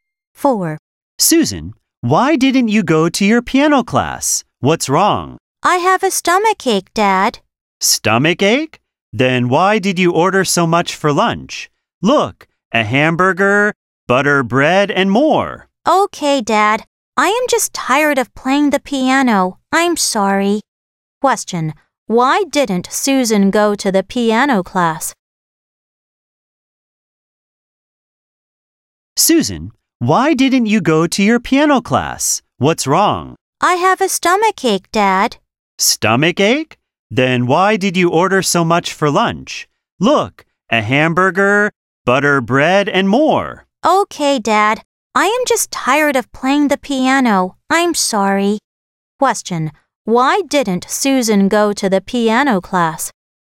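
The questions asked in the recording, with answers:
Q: Why didn't Susan go to the piano class?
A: She is tired of playing the piano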